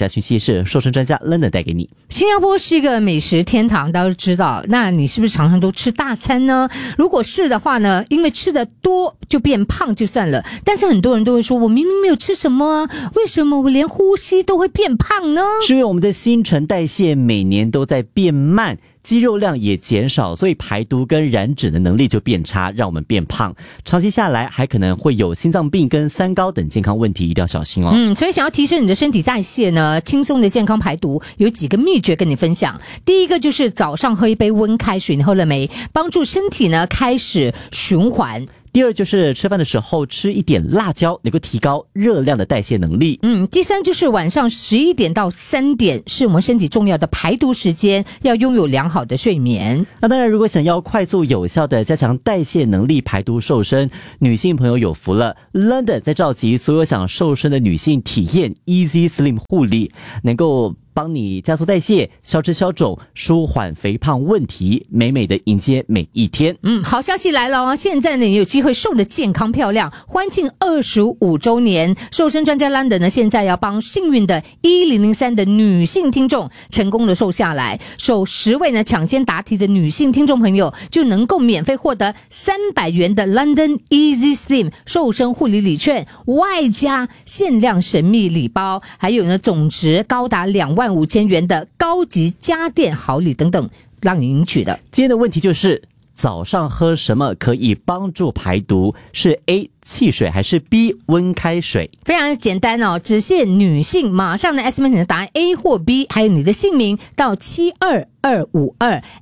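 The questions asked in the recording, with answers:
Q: 今天的问题就是,早上喝什么可以帮助排毒?是 A 汽水还是 B 温开水?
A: B: 温开水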